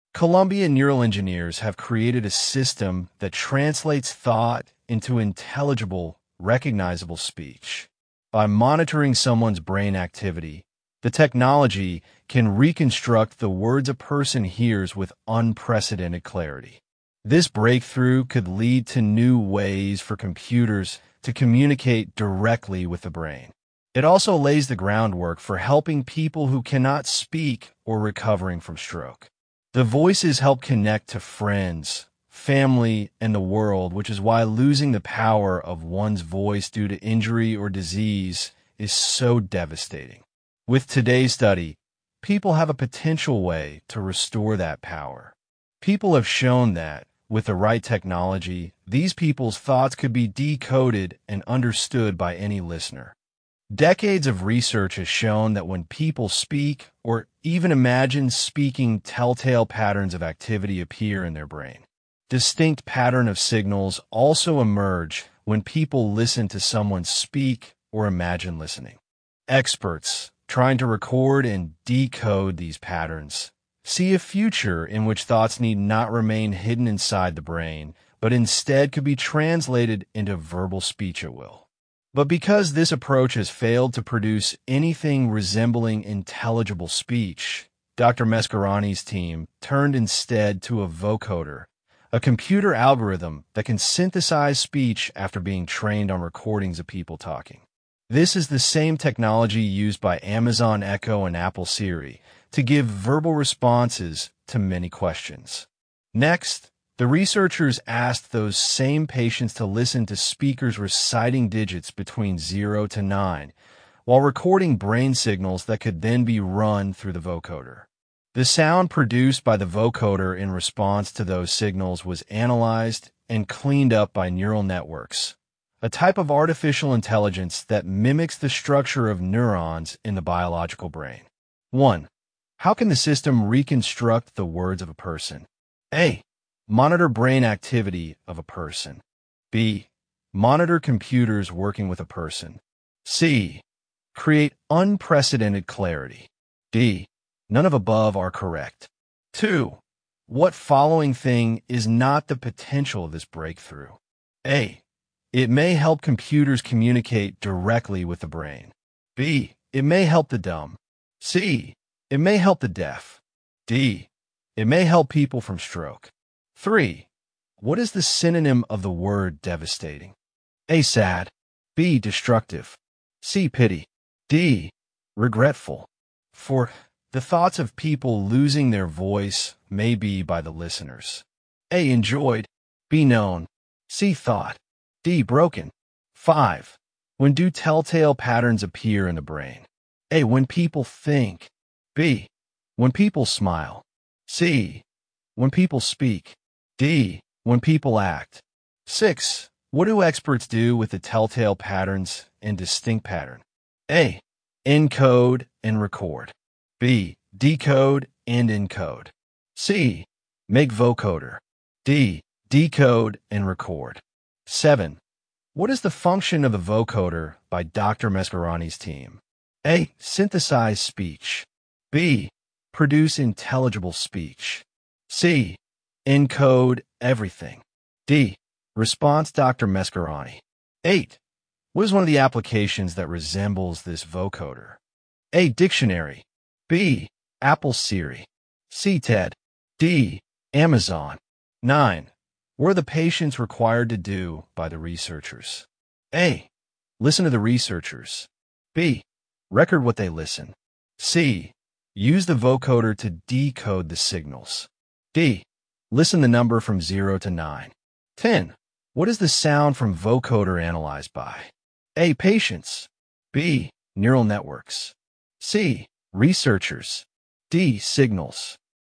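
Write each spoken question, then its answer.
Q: How can the system reconstruct the words of a person?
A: A: Monitor brain activity of a person.

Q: What following thing is not the potential of this breakthrough?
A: C: It may help the deaf.

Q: What is the synonym of the word devastating?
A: B: Destructive.

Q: The thoughts of people losing their voice may be by the listeners.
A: B: Known.

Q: When do telltale patterns appear in the brain?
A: C: When people speak.

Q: What do experts do with the telltale patterns and distinct pattern?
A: D: Decode and record.

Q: What is the function of the vocoder by Dr.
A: A: Synthesize speech.

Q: What are the patients required to do by the researchers?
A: D: Listen the number from 0 to 9.

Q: What is the sound from vocoder analyzed by?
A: B: Neural networks.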